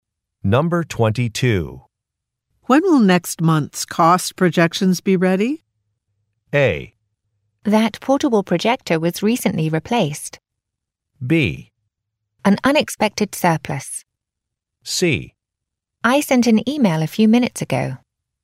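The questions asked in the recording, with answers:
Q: When will next month's cost projections be ready?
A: C: I sent an email a few minutes ago.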